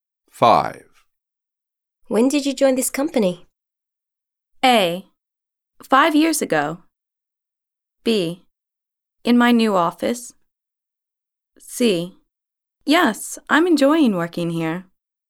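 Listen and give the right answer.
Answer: A: 5 years ago.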